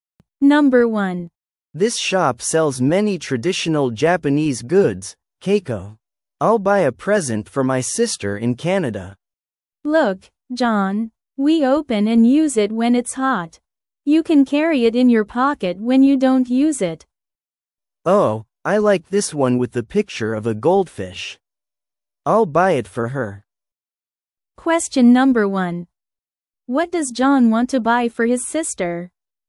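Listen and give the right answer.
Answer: A folding fan with a picture of a goldfish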